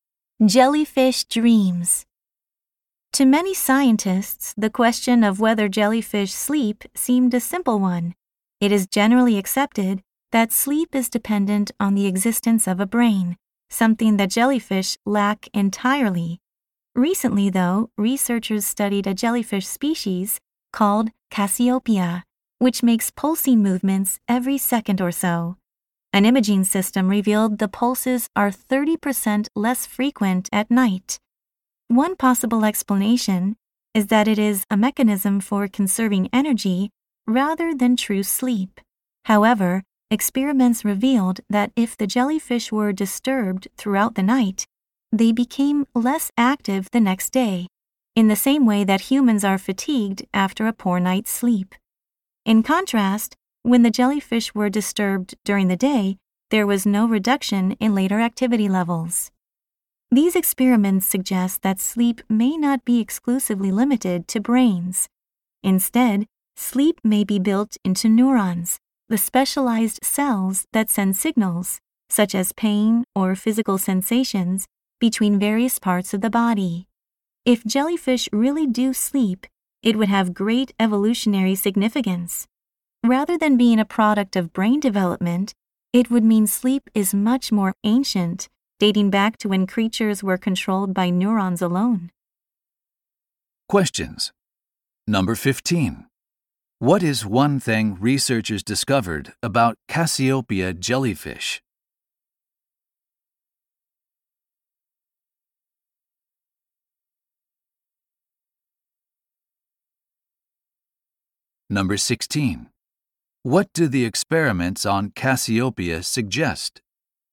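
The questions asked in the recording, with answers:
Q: What is one thing researchers discovered about Cassiopeia jellyfish?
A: Their pulses are about 30% less frequent at night.

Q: What do the experiments on Cassiopeia suggest?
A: Sleep may not need a brain; it may be built into neurons.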